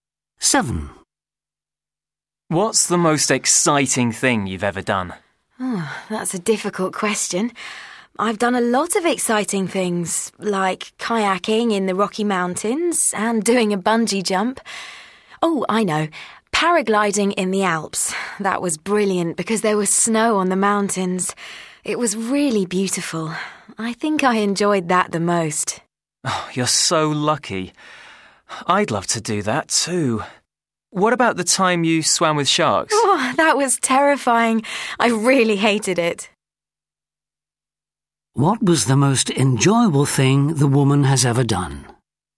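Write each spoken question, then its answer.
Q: What was the most enjoyable thing the woman has ever done?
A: Paragliding in the Alps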